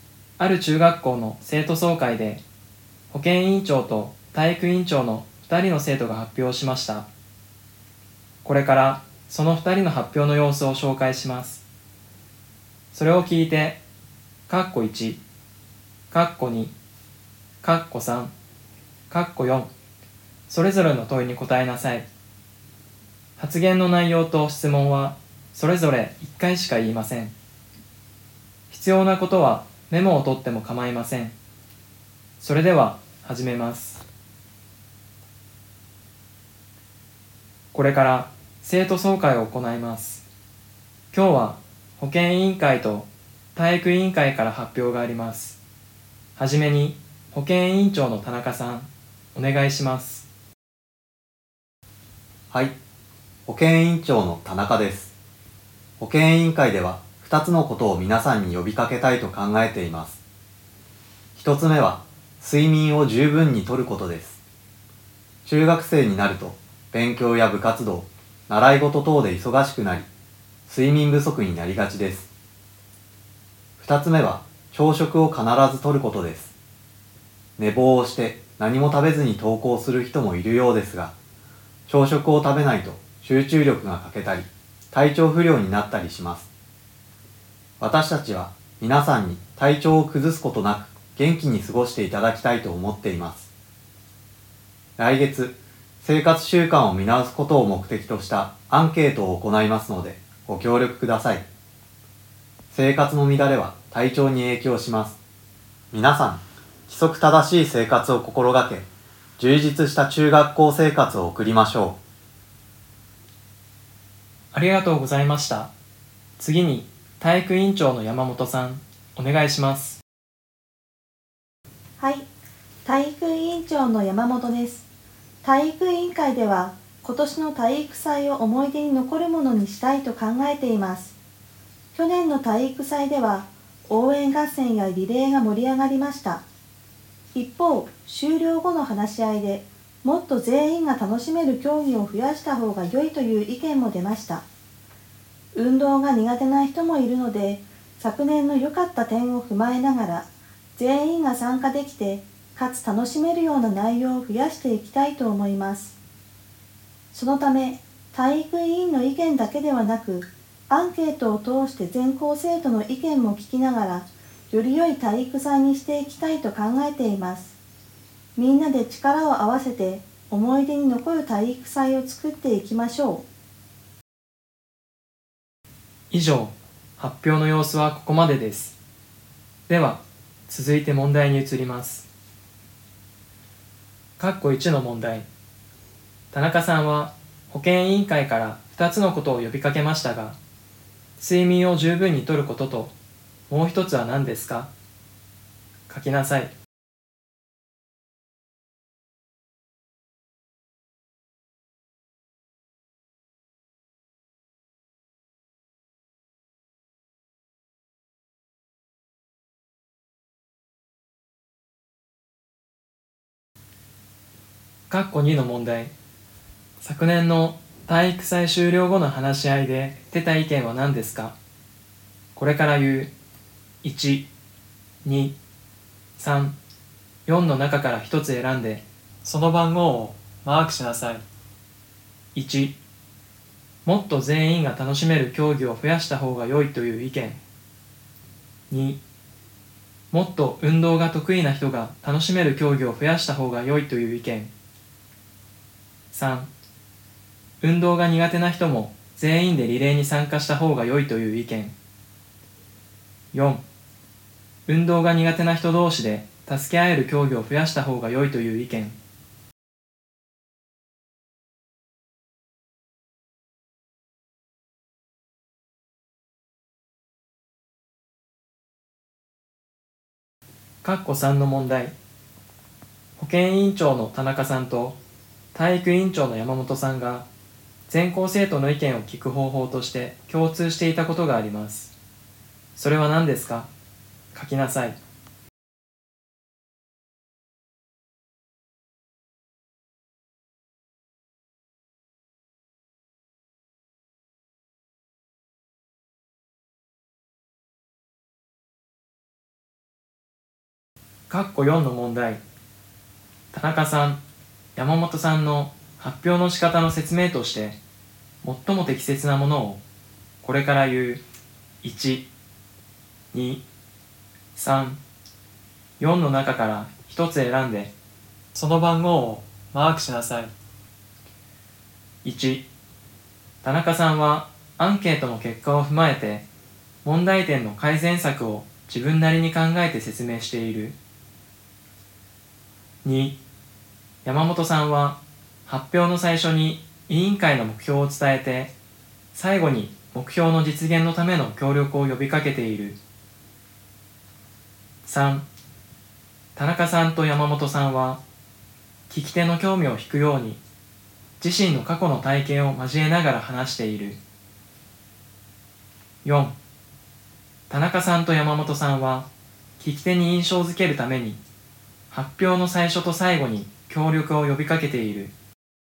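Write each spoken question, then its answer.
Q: 田中さんは保健委員会から2つのことを呼びかけましたが、睡眠を十分にとることともう一つは何ですか?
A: 朝食を必ずとること

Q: 昨年の体育祭終了後の話し合いで出た意見は何ですか?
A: 1: もっと全員が楽しめる競技を増やした方が良いという意見。

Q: 保健委員長の田中さんと体育委員長の山本さんが全校生徒の意見を聞く方法として共通していたことがあります。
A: アンケートを行うこと

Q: 田中さん、山本さんの発表の仕方の説明として最も適切なものをこれから言う1、2、3、4の中から一つ選んで、その番号をマークしなさい。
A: 2: 山本さんは発表の最初に委員会の目標を伝えて、最後に目標の実現のための協力を呼びかけている。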